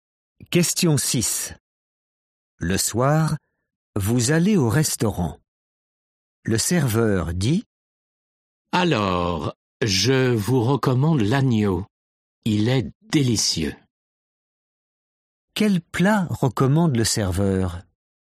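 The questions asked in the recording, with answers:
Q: Quel plat recommande le serveur?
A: l'agneau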